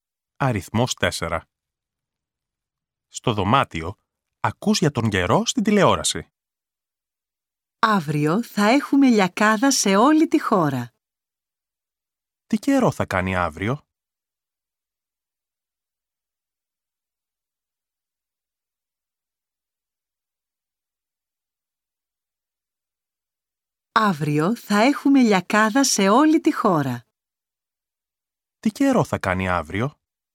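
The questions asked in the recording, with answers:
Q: Τι καιρό θα κάνει αύριο?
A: Λιακάδα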